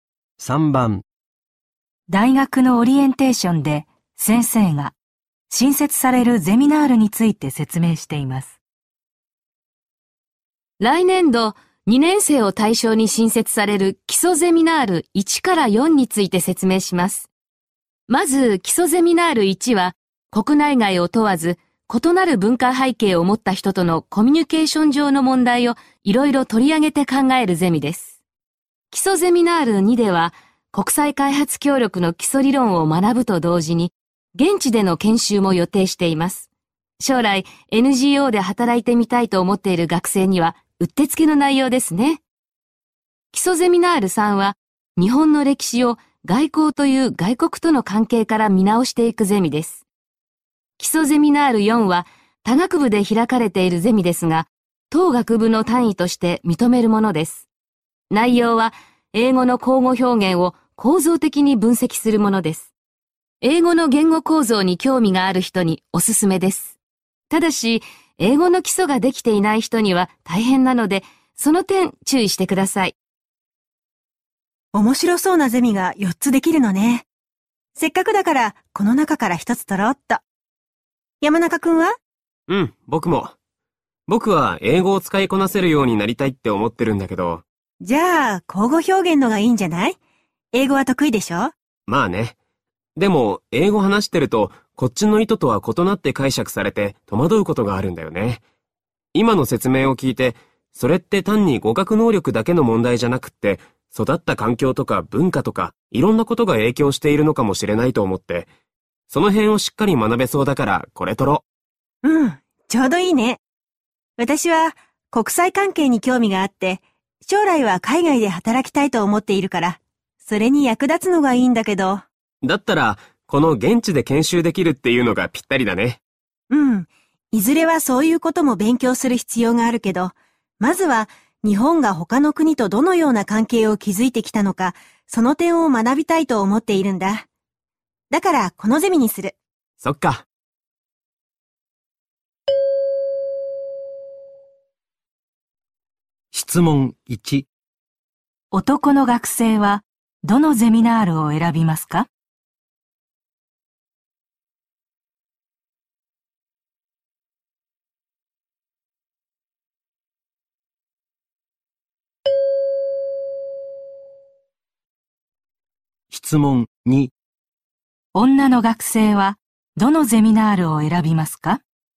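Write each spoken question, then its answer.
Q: 男の学生は、どのゼミナールを選びますか?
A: 基礎ゼミナール1

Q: 女の学生は、どのゼミナールを選びますか?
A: 基礎ゼミナール3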